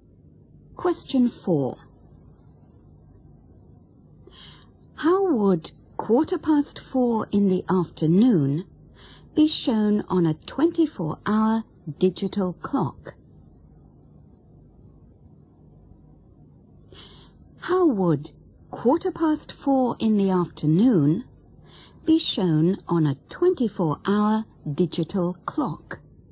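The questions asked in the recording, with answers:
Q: How would 4:15 in the afternoon be shown on a 24-hour digital clock?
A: 16:15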